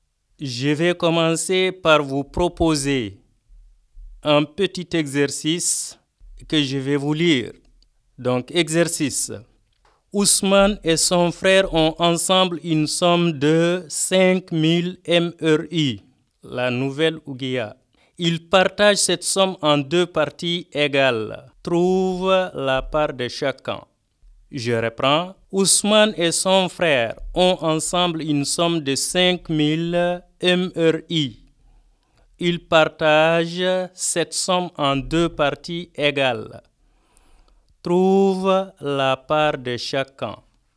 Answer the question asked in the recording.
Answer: Donc, chacun des deux aura 2500 MRI.